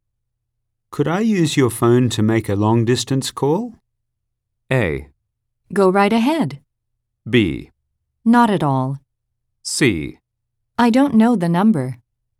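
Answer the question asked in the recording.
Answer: A: Go right ahead.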